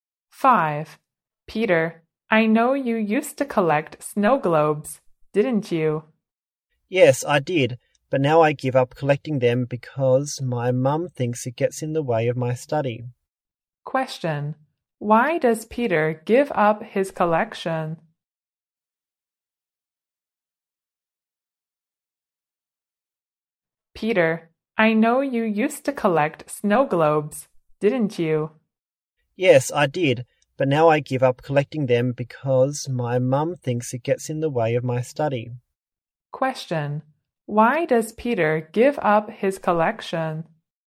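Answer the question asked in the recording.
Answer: It gets in the way of his study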